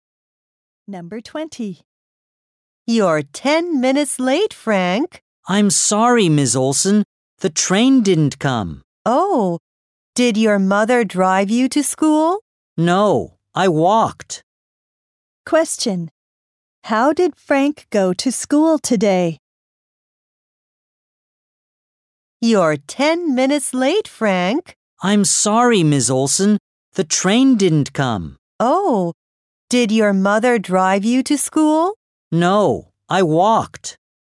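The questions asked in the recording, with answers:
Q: Question. How did Frank go to school today?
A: He walked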